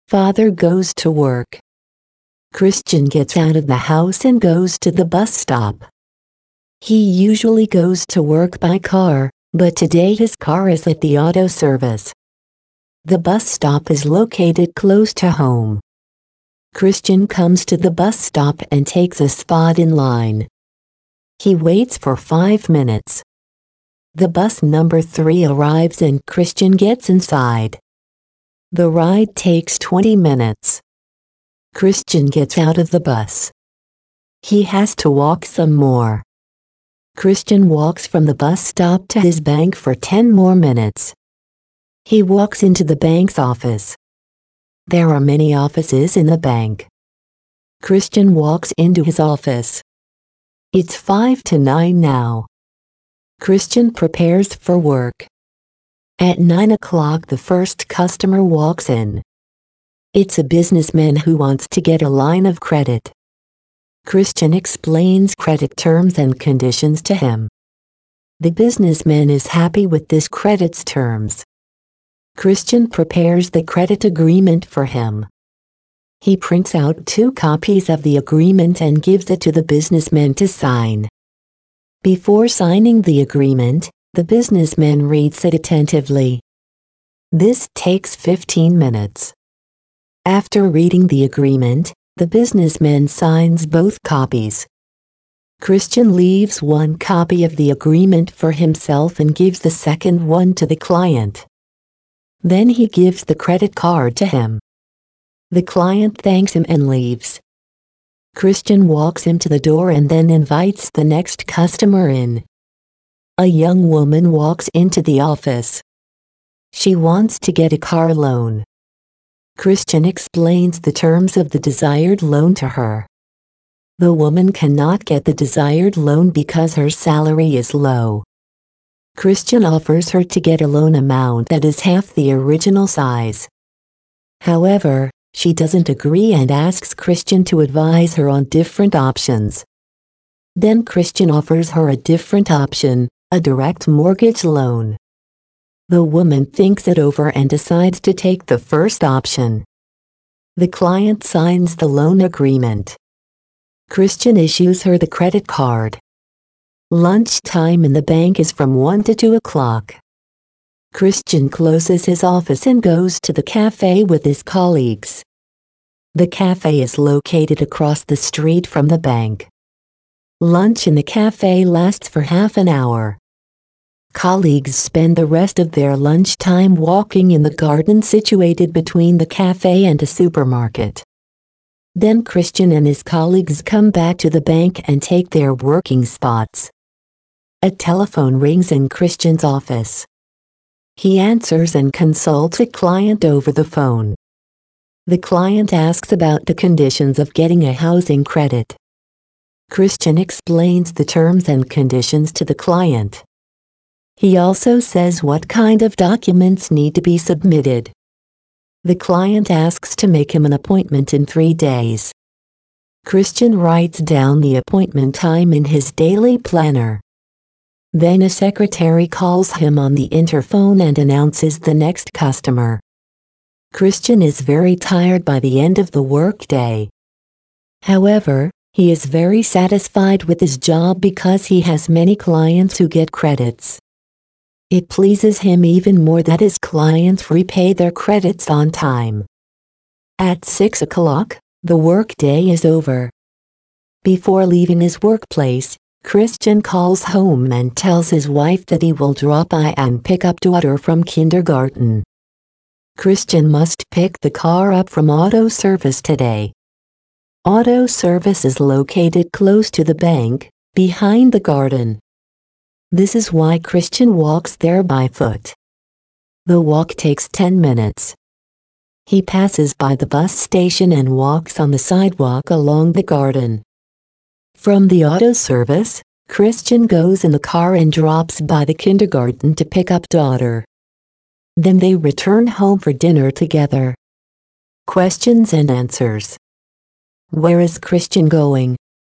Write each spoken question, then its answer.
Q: Where is Christian going?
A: He gets out of the house and walks to the bus stop.